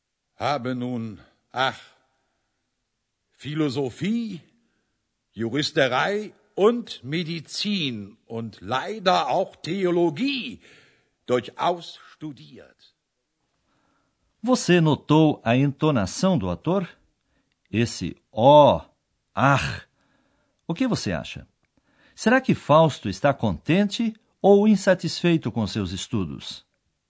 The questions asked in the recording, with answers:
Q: Será que Fausto está contente ou insatisfeito com seus estudos?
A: Ele está insatisfeito.